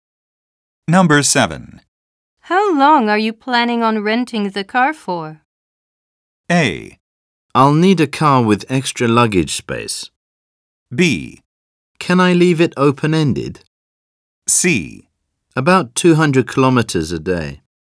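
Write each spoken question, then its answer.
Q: How long are you planning on renting the car for?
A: B: Can I leave it open-ended?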